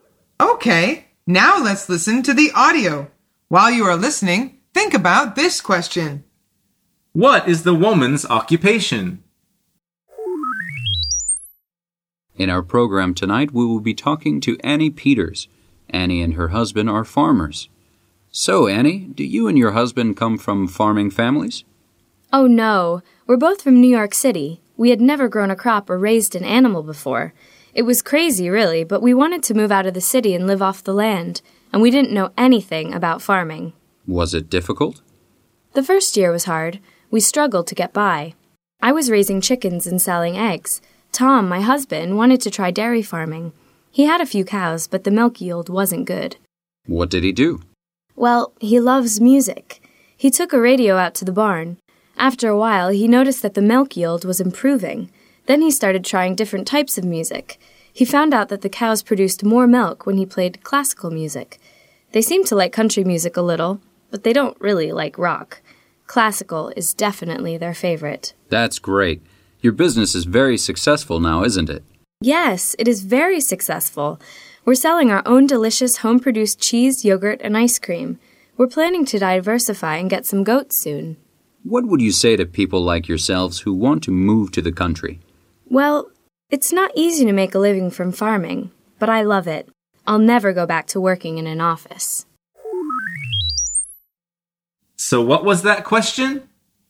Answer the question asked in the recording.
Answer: The answer is she's a farmer.